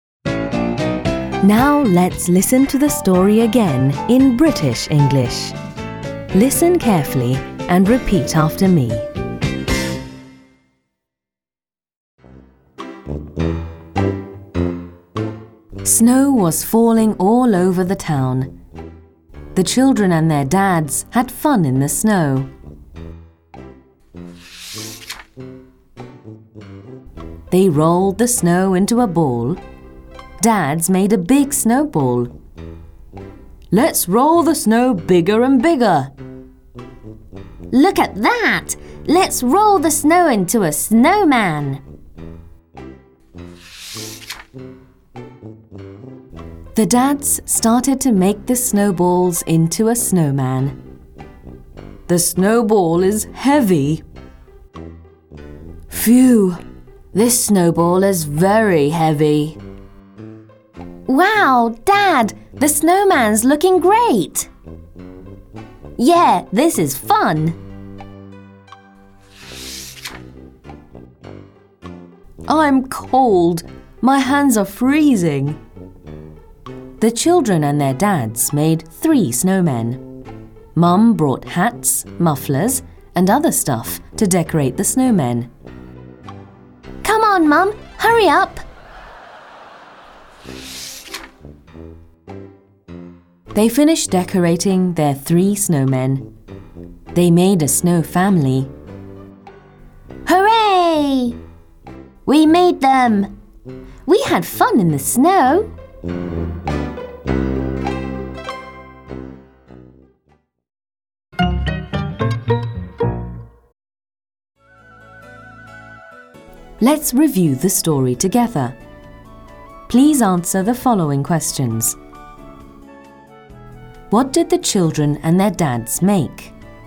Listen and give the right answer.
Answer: They made snowmen.